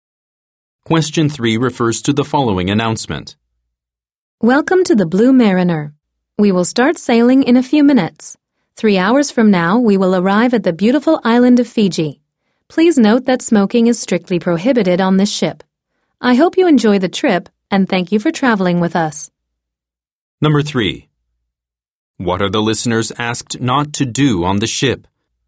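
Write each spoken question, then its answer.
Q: What are the listeners asked not to do on the ship?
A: Smoke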